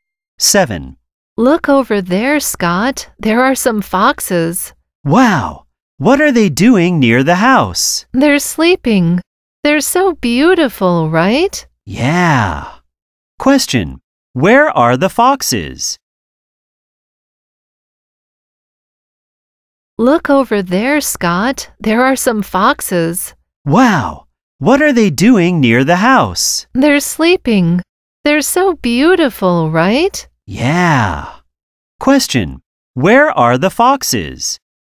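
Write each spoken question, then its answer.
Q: where are the foxes?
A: Near the house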